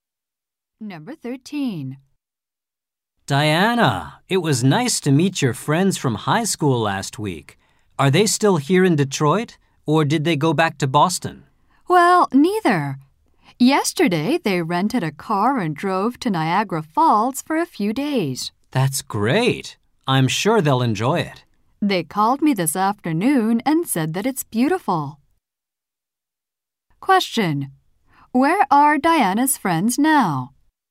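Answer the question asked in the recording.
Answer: At Niagara Falls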